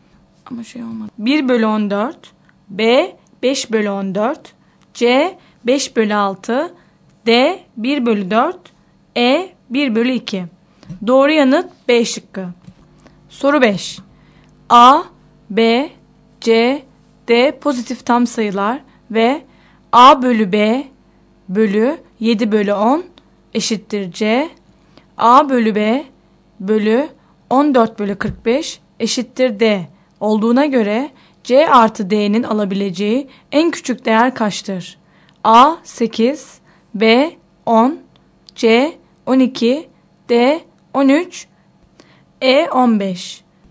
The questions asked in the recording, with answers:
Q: A bölü B bölü 14 bölü 45 eşittir D olduğuna göre C artı D'nin alabileceği en küçük değer kaçtır?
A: Doğru yanıt D şıkkı.